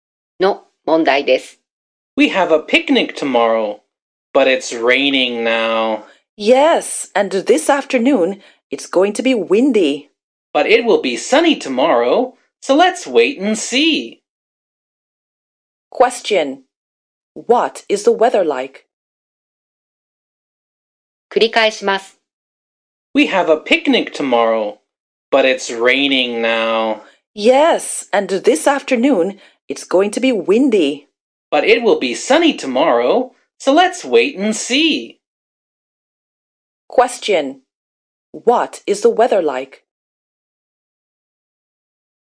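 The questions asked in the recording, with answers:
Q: What is the weather like?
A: It's raining now.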